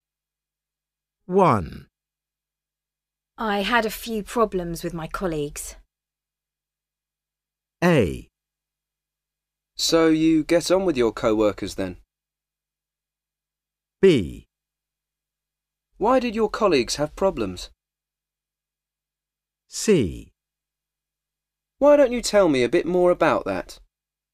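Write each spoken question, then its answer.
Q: I had a few problems with my colleagues.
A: C: Why don't you tell me a bit more about that?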